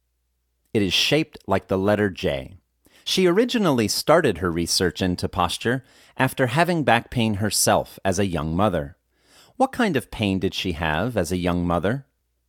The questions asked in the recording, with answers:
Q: What kind of pain did she have as a young mother?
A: She had back pain as a young mother.